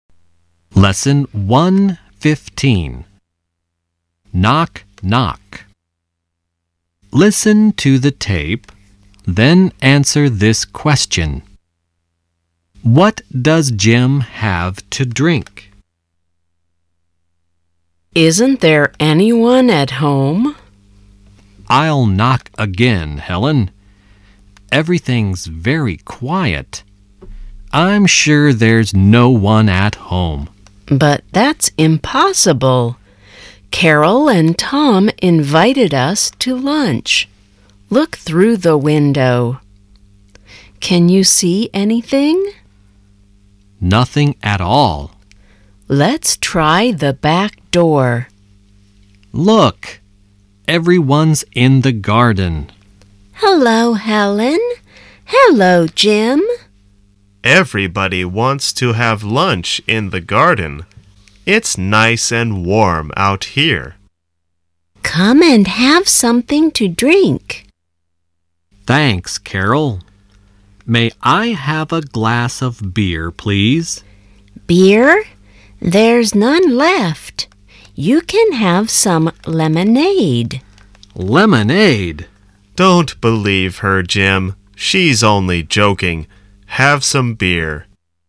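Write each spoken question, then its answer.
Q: What does Jim have to drink?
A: Beer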